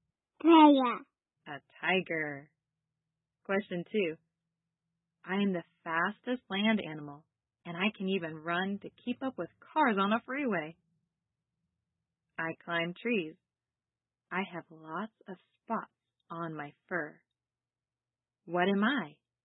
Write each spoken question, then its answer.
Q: What am I?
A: Cheetah.